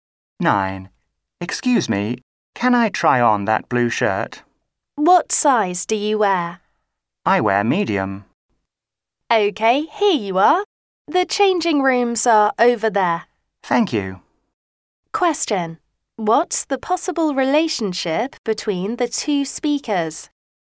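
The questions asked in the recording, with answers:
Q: What's the possible relationship between the two speakers?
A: Customer and shop assistant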